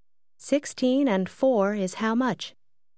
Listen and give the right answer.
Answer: 20.